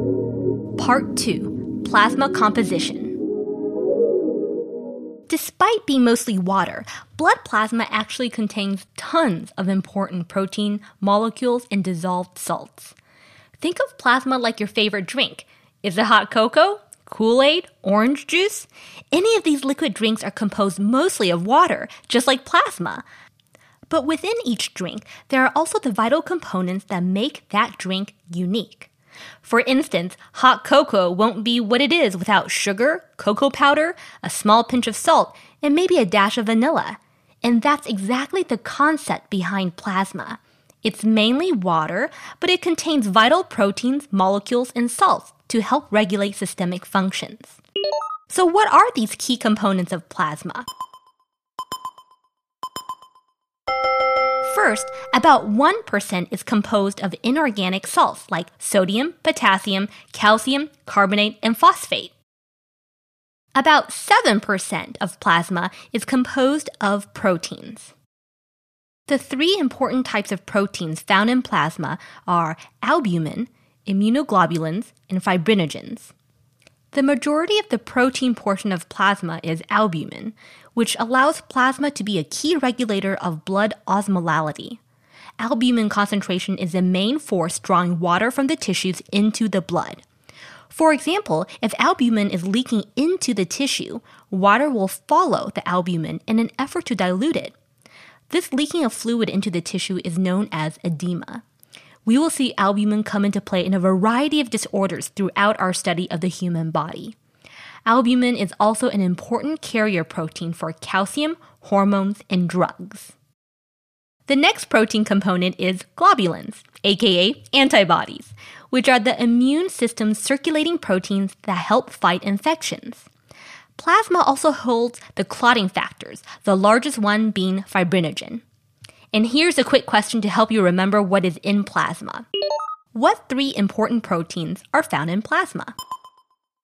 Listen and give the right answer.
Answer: Albumin, immunoglobulins, and fibrinogens.